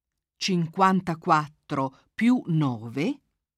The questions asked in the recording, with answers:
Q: 54 più 9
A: fa 63.